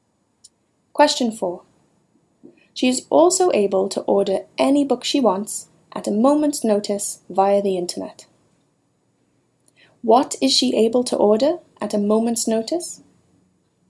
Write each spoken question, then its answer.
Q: What is she able to order at a moment's notice?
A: Mary is able to order any book she wants at a moment's notice.